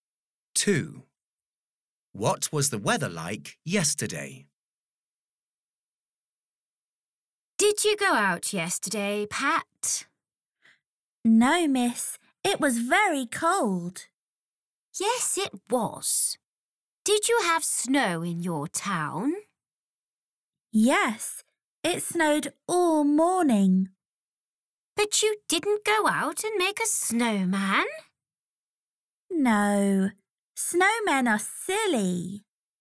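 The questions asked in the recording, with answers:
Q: What was the weather like yesterday?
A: cold and snowy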